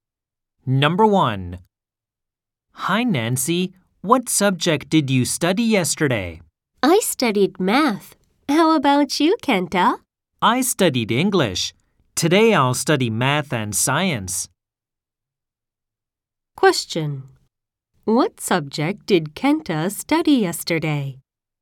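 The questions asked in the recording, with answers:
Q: What subject did Kenta study yesterday?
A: English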